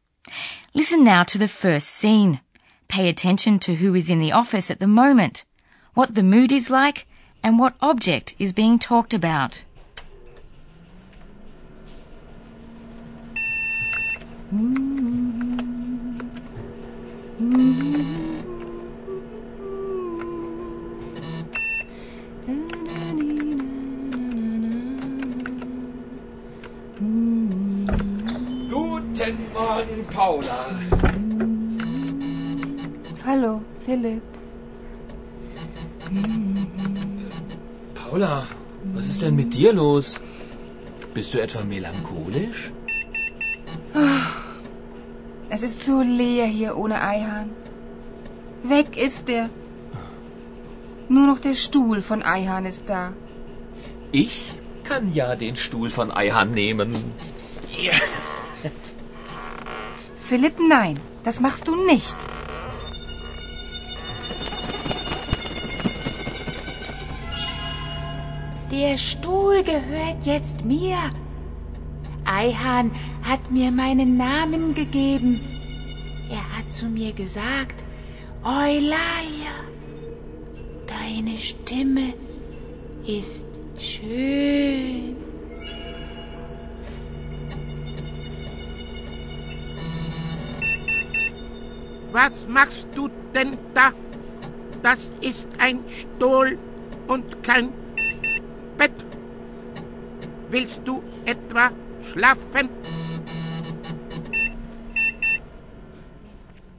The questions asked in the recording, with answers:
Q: Pay attention to who is in the office at the moment, what the mood is like, and what object is being talked about.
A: In the office at Radio D, you first of all heard the two journalists, Paula and Philip. Paula is feeling a bit melancholy, while Philip is in the best of spirits, and they are talking about a chair, Stuhl.